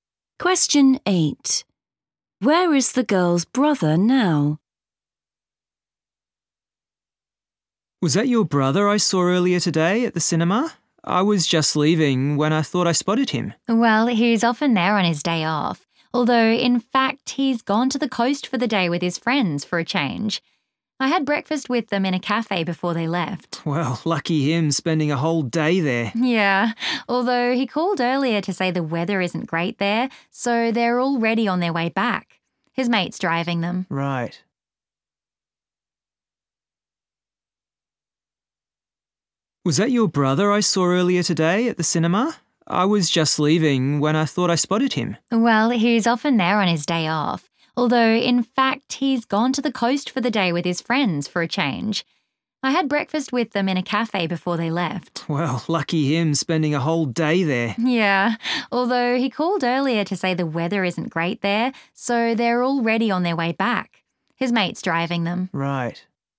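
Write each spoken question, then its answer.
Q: Where is the girl's brother now?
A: in his friend's car, on the way back from the coast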